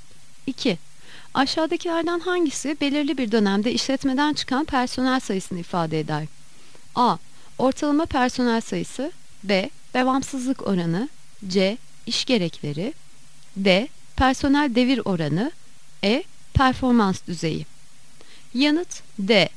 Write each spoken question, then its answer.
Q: Aşağıdakilerden hangisi belirli bir dönemde işletmeden çıkan personel sayısını ifade eder?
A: Yanıt D. Personel devir oranı.